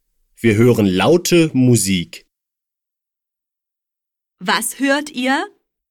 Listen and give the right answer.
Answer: Laute Musik. Wir hören laute Musik.